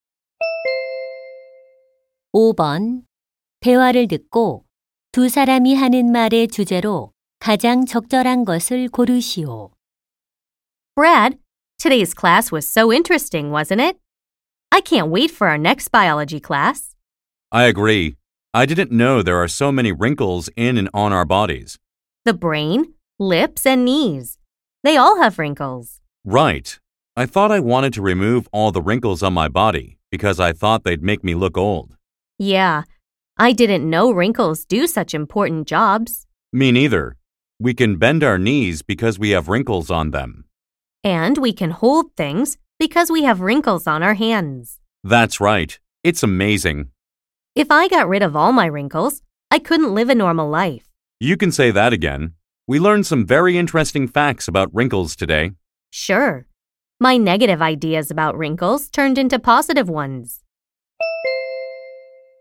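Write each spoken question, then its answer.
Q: 대화를 듣고 두 사람이 하는 말의 주제로 가장 적절한 것을 고르시오.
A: 신체 주름의 중요한 역할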